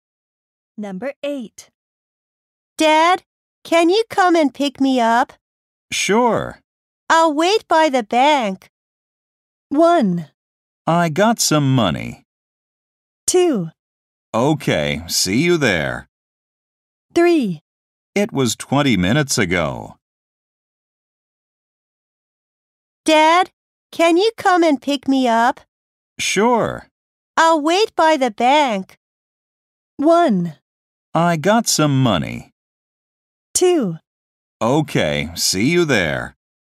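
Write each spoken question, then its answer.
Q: I'll wait by the bank.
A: 2: Okay, see you there.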